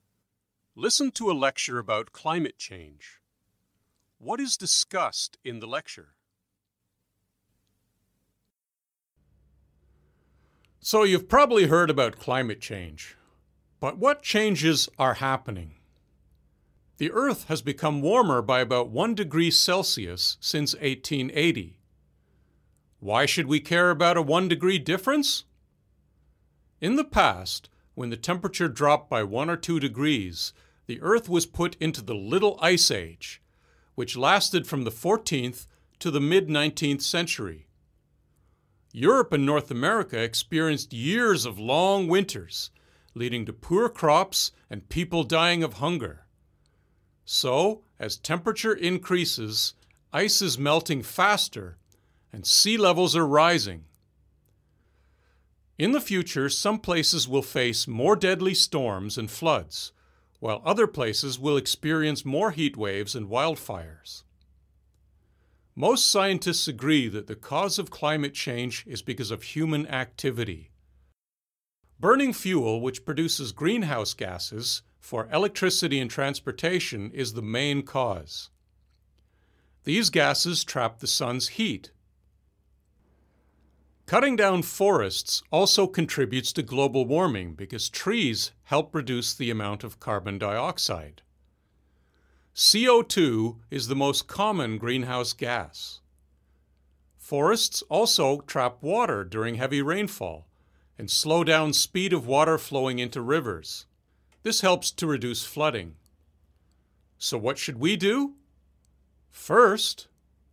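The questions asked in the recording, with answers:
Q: What is discussed in the lecture?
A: Climate change: its effects and causes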